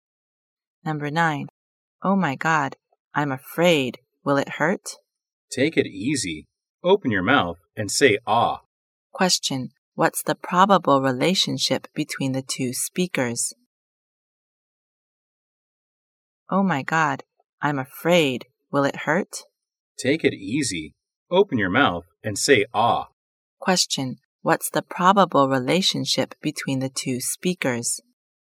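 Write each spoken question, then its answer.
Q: Question. What's the probable relationship between the two speakers?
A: Dentist (doctor) and patient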